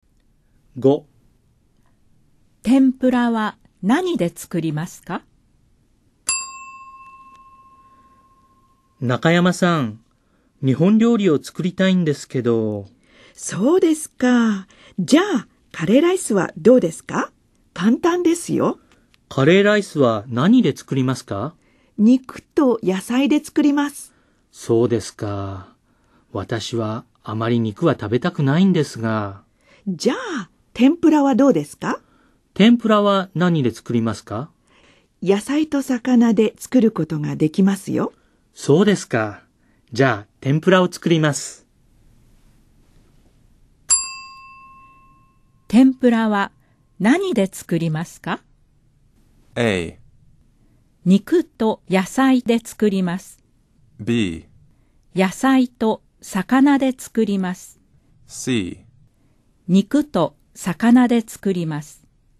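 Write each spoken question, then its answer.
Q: 天ぷらは何で作りますか?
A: B: 野菜と魚で作ります。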